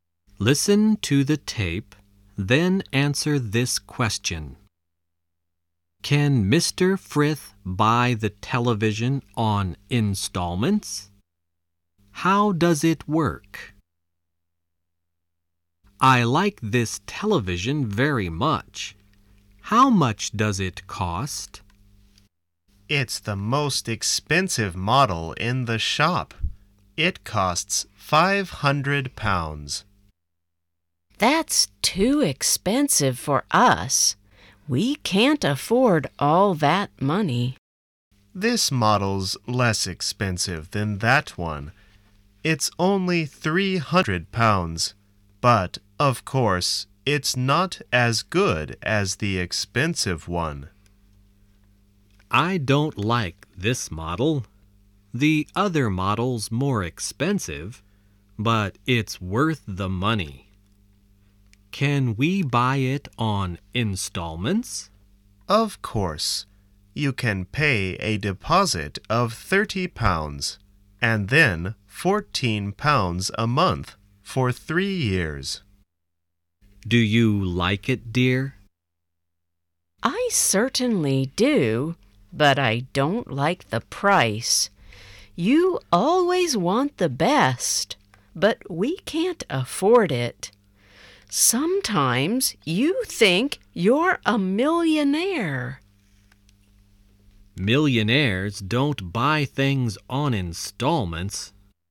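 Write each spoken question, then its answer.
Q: Can Mr. Frith buy the television on installments?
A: Yes, he can pay a deposit of £30 and then £14 a month for 3 years.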